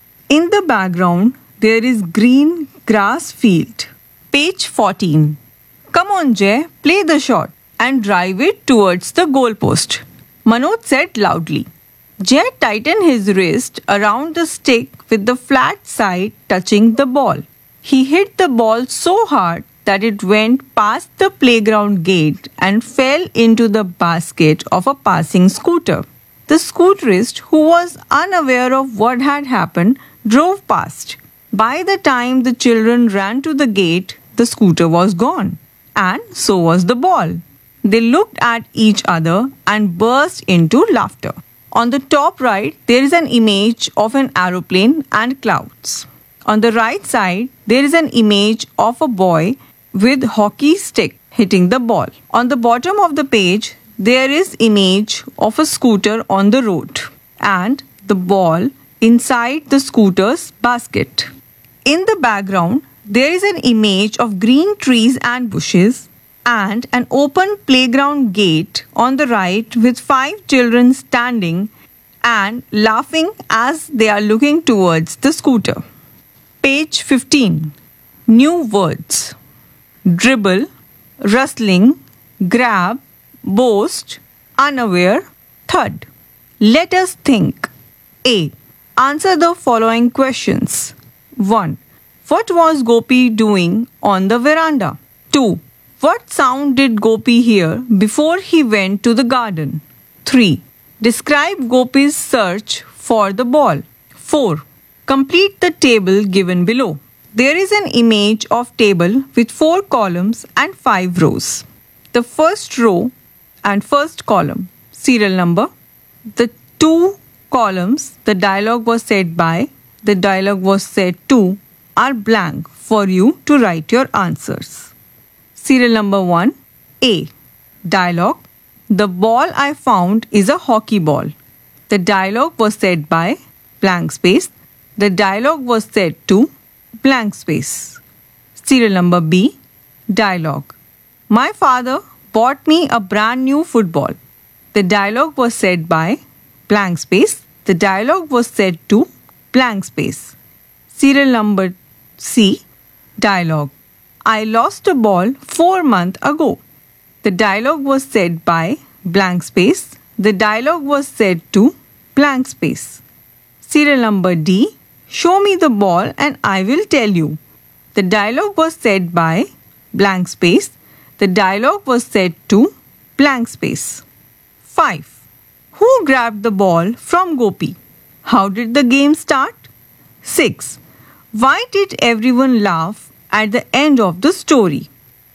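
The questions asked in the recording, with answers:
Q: Why did everyone laugh at the end of the story?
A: Jay hit the ball so hard that it landed in a passing scooter's basket, and the scooter drove off with it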